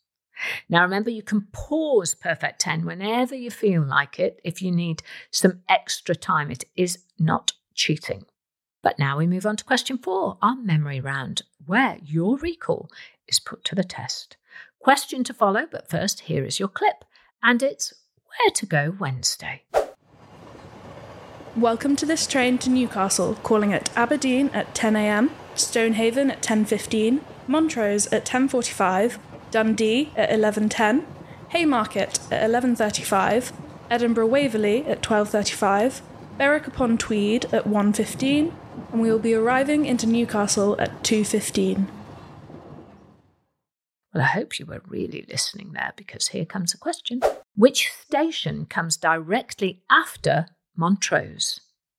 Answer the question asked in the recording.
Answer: And the answer is Dundee.